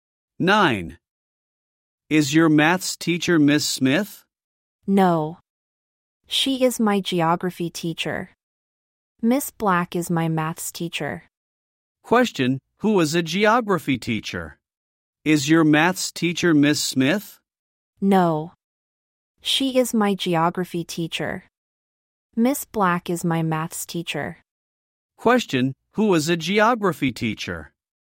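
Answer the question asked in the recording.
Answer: Miss Smith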